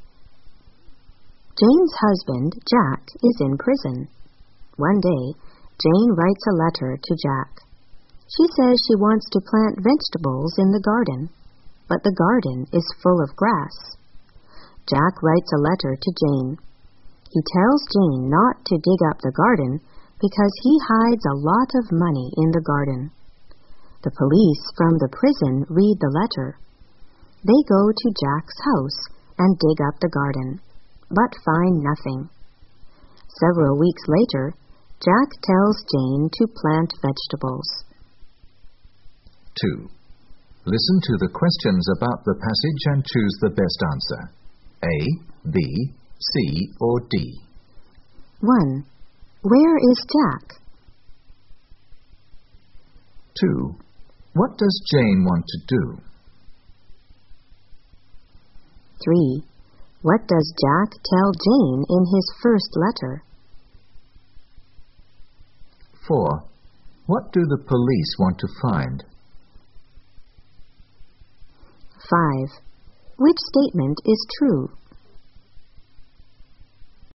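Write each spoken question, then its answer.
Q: Where is Jack?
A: In prison

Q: What does Jane want to do?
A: Plant vegetables in the garden

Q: What does Jack tell Jane in his first letter?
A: Not to dig up the garden because he hid a lot of money there

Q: What do the police want to find?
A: The money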